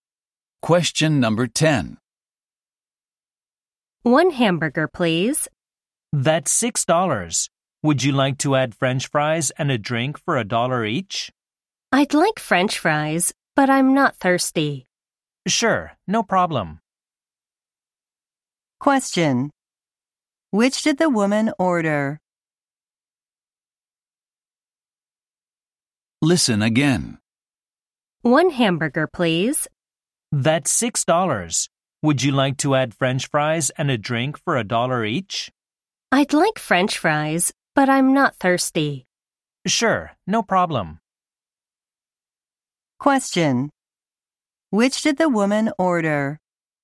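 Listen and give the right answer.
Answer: A hamburger and French fries (no drink)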